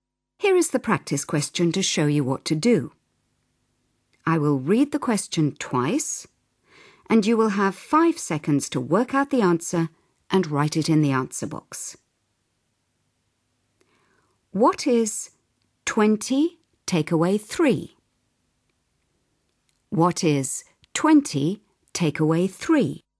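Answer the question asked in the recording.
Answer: 17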